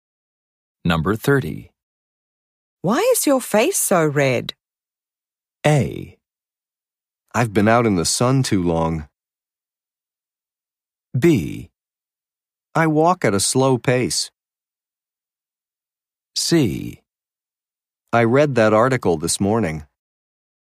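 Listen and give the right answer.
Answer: A: I've been out in the sun too long.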